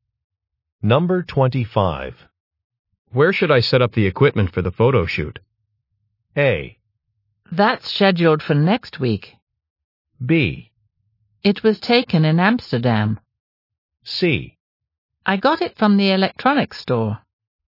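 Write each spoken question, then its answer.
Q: Where should I set up the equipment for the photo shoot?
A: A: That's scheduled for next week.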